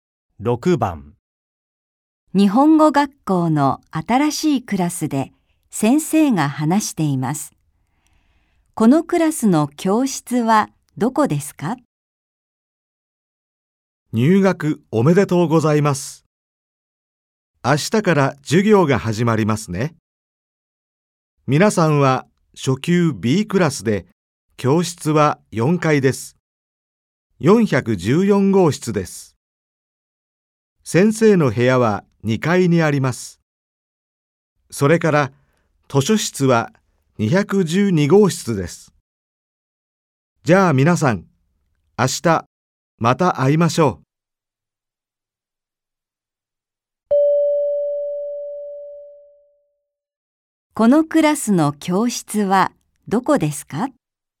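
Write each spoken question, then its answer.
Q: このクラスの教室はどこですか?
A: 4階の414号室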